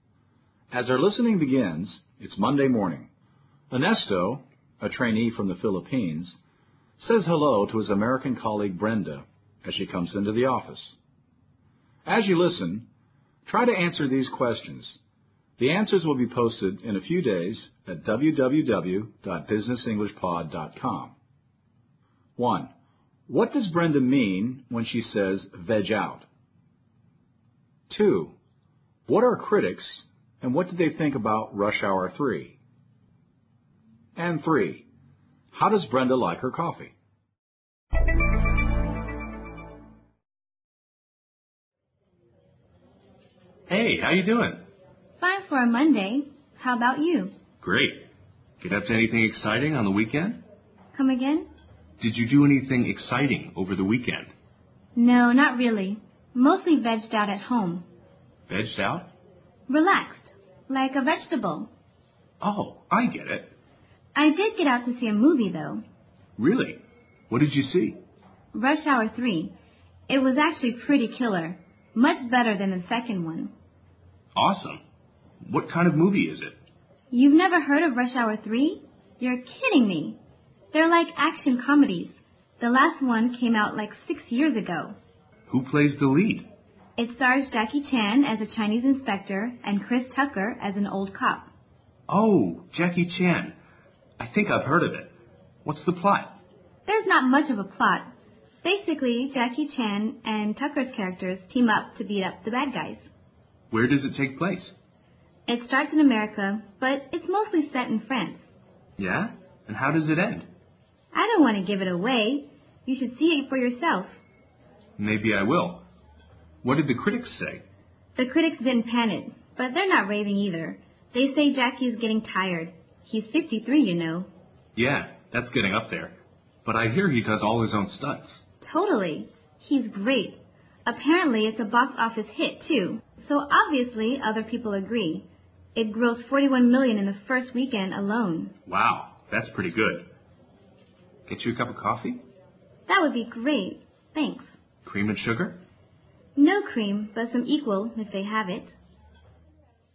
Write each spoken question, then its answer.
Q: What does Brenda mean when she says veg out?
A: As Brenda says, veg out means to relax.

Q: How does Brenda like her coffee?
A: Brenda doesn't take cream and sugar in her coffee.